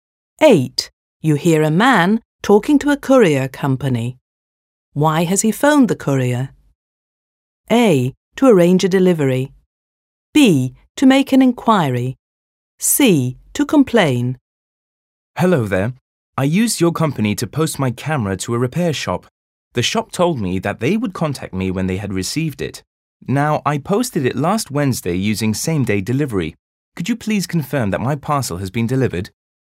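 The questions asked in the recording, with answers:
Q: Why has he phoned the courier?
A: B: To make an inquiry.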